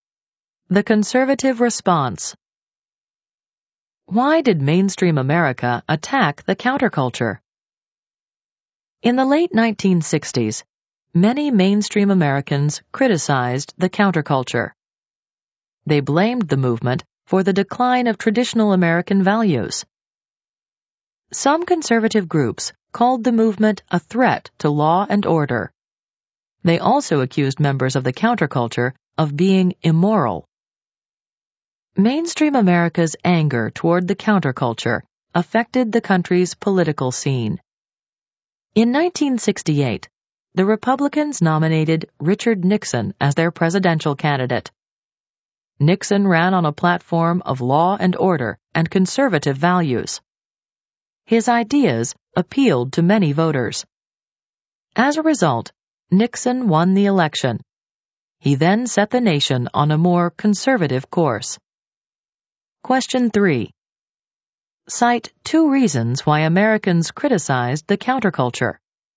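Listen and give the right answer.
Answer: They blamed it for the decline of traditional values, saw it as a threat to law and order, and called it immoral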